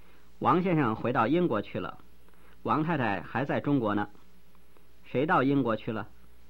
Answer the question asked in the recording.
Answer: 王先生到英国去 了。